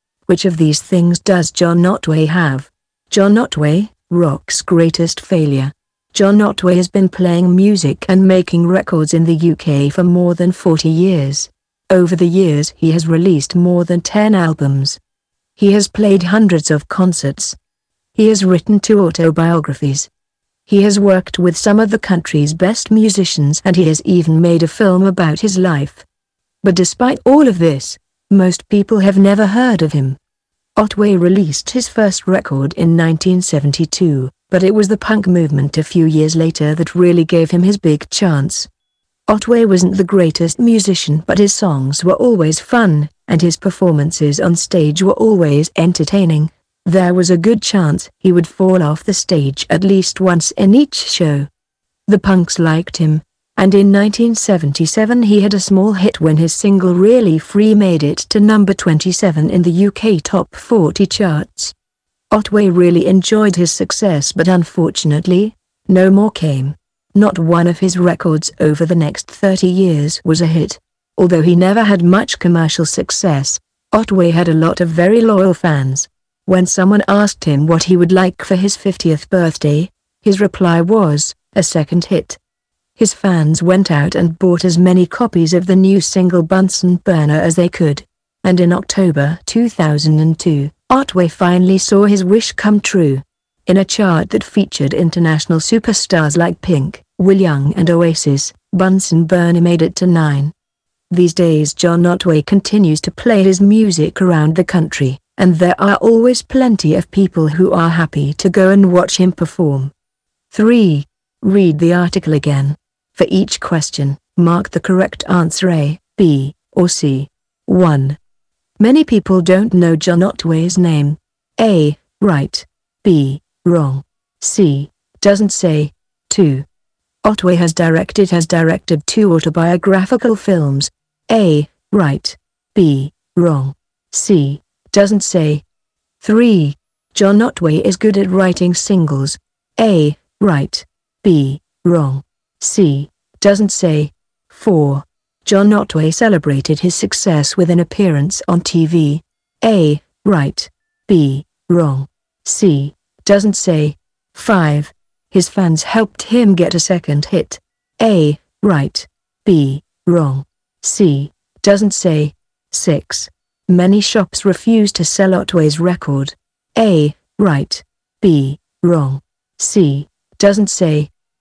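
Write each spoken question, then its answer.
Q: Many people don't know John Otway's name.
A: A: Right

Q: Otway has directed 2 autobiographical films.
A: B: Wrong

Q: John Otway celebrated his success with an appearance on TV.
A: C: Doesn't say

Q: His fans helped him get a second hit.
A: A: Right

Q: Many shops refuse to sell Otway's record.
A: C: Doesn't say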